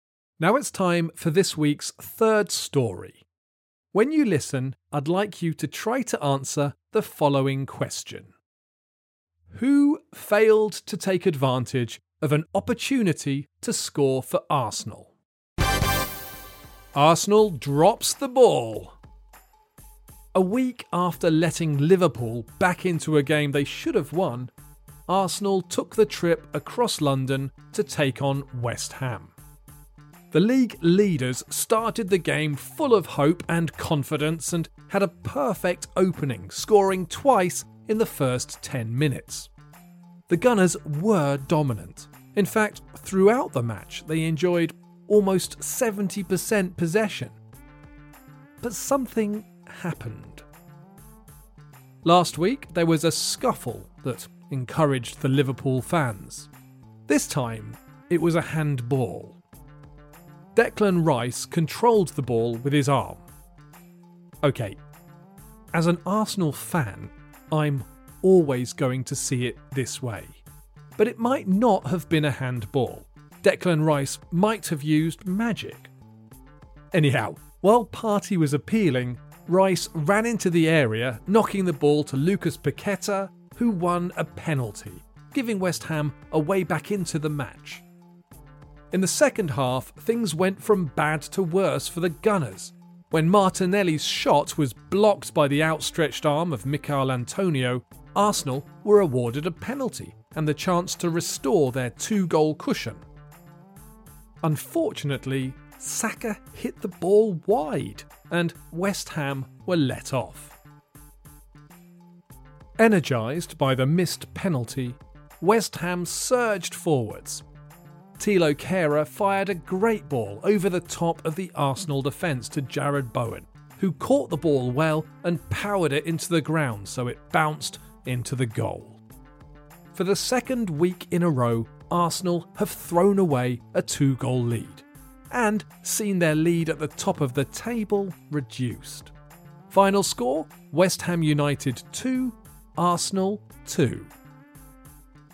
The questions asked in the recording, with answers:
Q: Who failed to take advantage of an opportunity to score for Arsenal?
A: The answer is Bukayo Saka, who missed a crucial penalty.